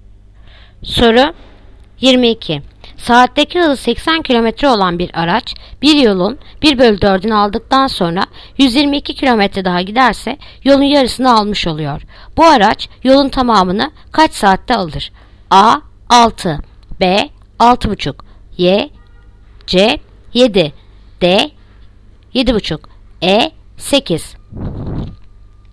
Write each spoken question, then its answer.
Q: Bu araç yolun tamamını kaç saatte alır?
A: Yanıt Adana 6.